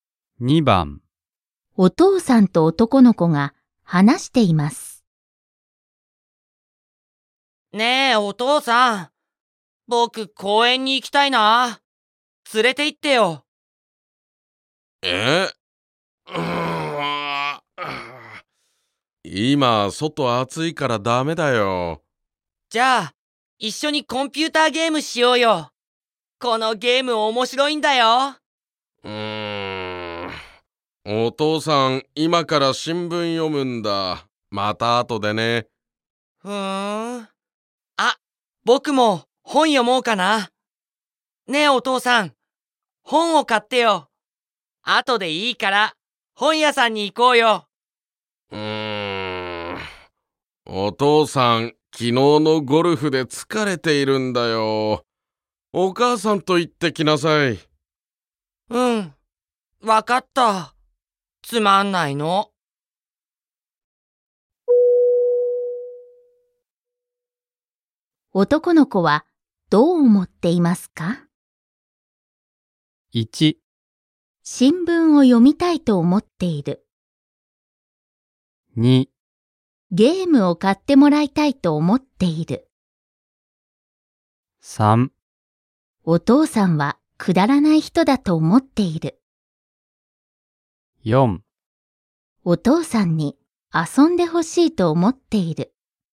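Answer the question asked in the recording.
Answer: 4: お父さんに遊んでほしいと思っている。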